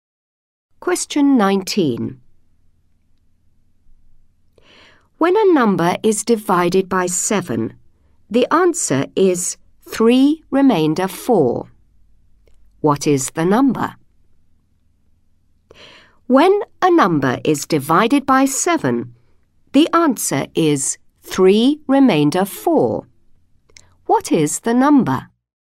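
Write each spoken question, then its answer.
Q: What is the number?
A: 25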